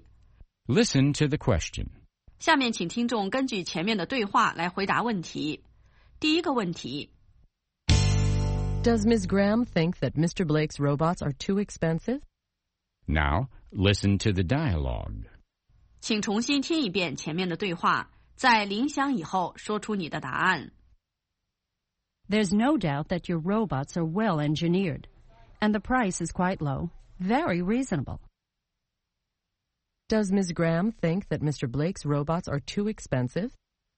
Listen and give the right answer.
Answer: No, she doesn't. She thinks the price of the robots is quite low.